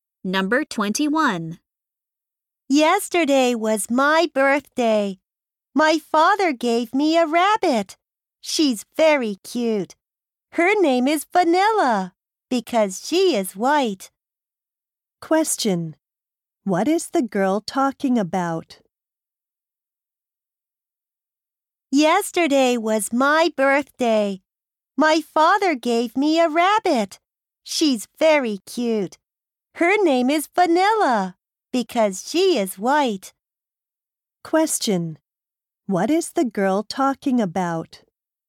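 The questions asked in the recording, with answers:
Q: What is the girl talking about?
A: Her birthday present, a rabbit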